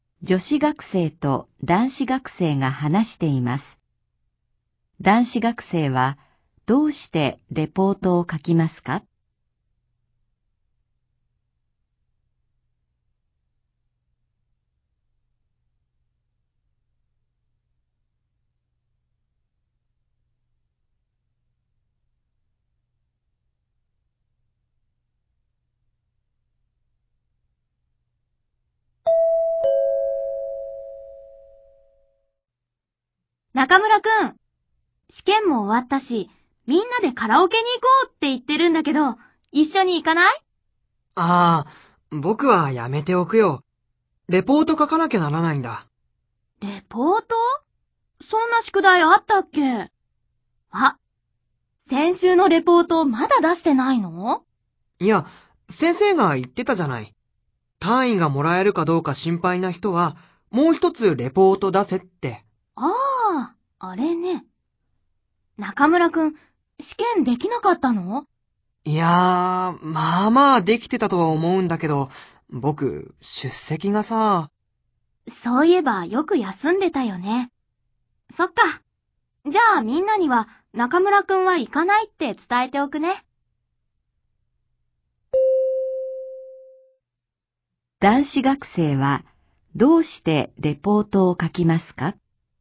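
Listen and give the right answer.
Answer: 出席が足りず、単位がもらえるか心配だから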